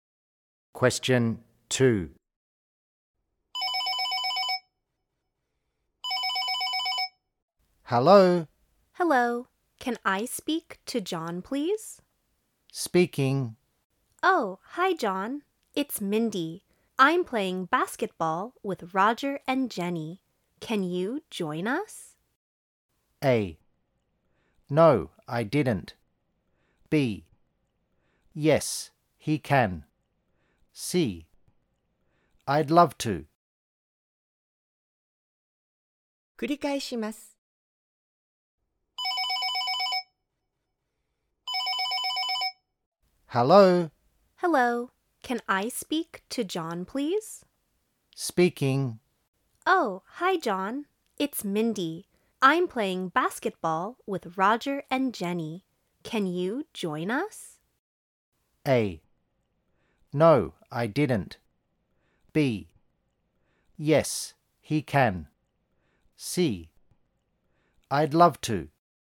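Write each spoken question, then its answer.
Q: Can you join us?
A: C: I'd love to.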